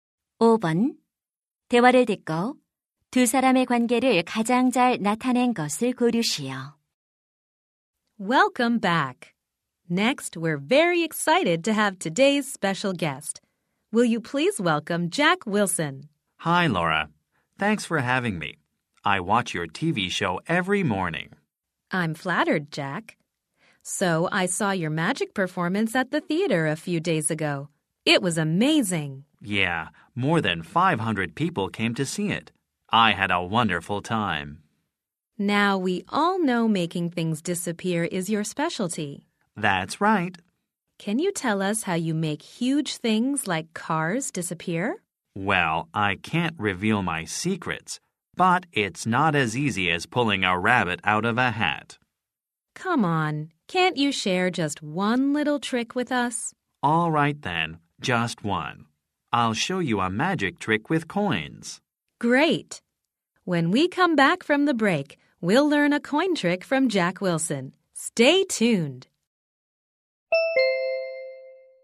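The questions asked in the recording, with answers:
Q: 대화를 듣고 두 사람의 관계를 가장 잘 나타낸 것을 고르시오.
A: TV 쇼 진행자 - 마술사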